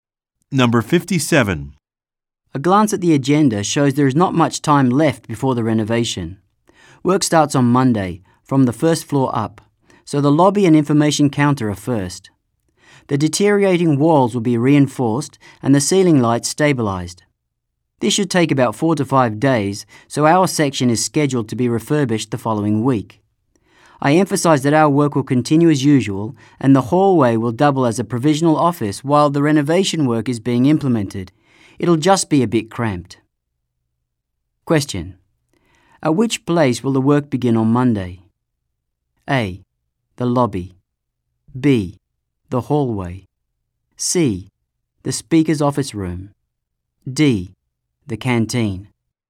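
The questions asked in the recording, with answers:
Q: at which place will the work begin on Monday?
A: A: The lobby.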